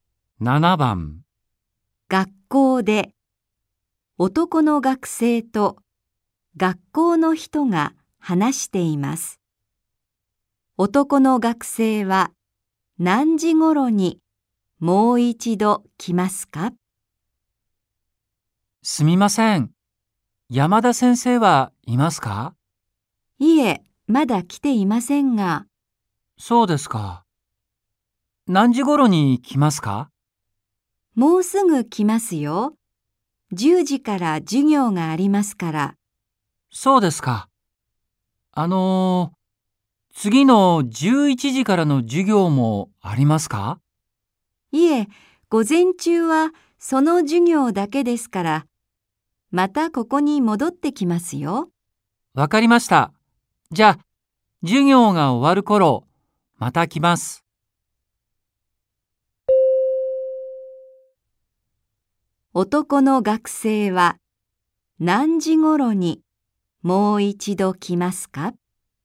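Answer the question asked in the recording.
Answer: 11時ごろ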